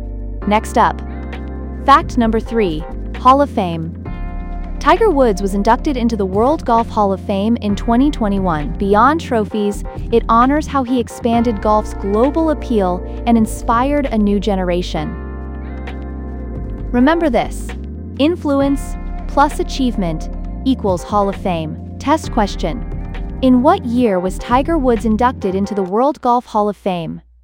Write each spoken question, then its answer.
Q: In what year was Tiger Woods inducted into the World Golf Hall of Fame?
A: 2021.